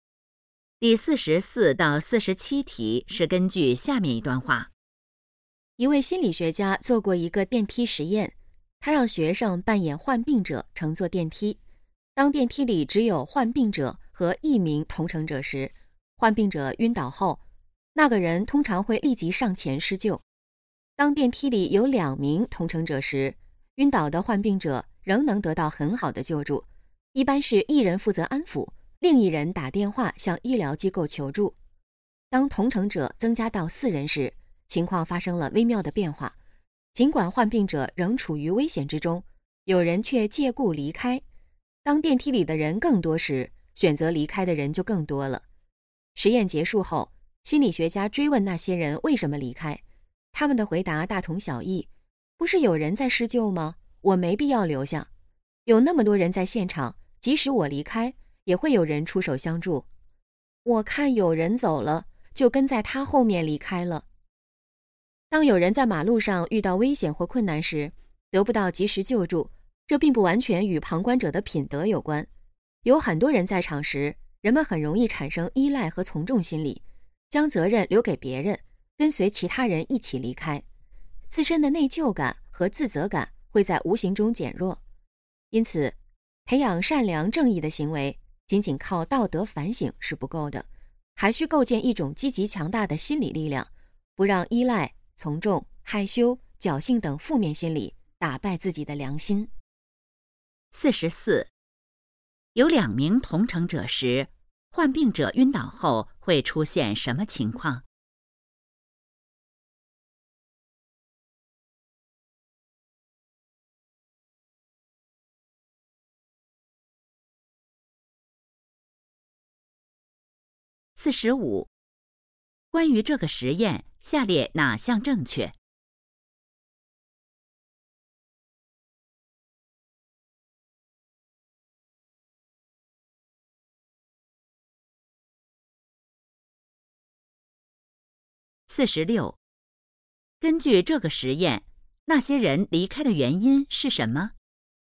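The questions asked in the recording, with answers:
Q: 有两名同乘者时,患病者晕倒后会出现什么情况?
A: 一人安抚,另一人打电话求助

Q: 根据这个实验,那些人离开的原因是什么?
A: 认为会有别人施救(依赖和从众心理)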